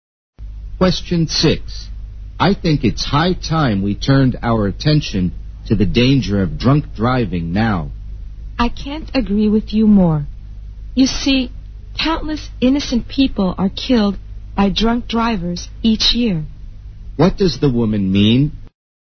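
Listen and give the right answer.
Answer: She fully agrees that drunk driving must be dealt with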